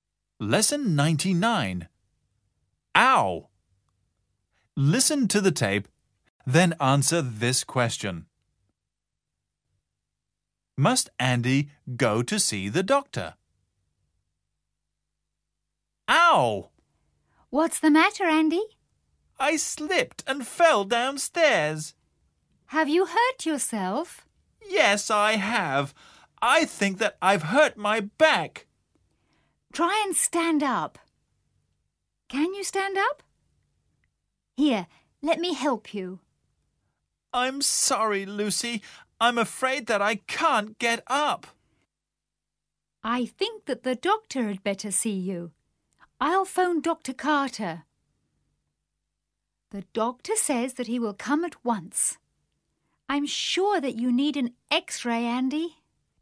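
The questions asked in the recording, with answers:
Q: Must Andy go to see the doctor?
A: No, the doctor will come to see him.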